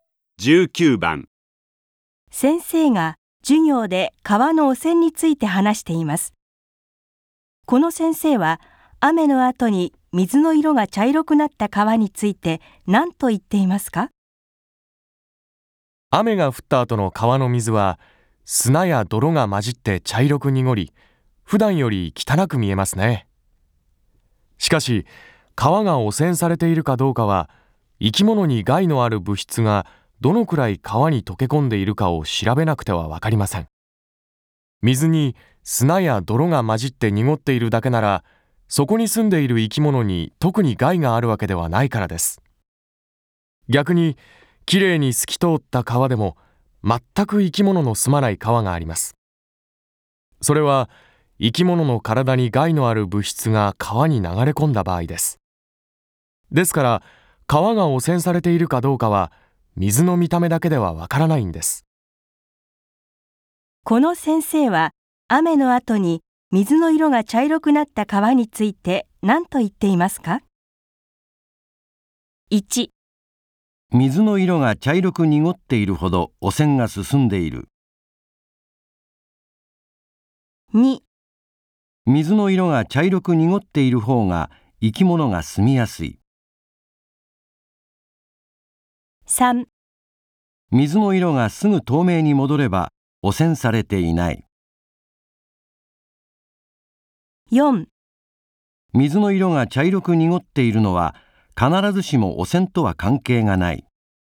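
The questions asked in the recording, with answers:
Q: この先生は雨の後に水の色が茶色くなった川について何と言っていますか?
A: 4: 水の色が茶色く濁っているのは必ずしも汚染とは関係がない。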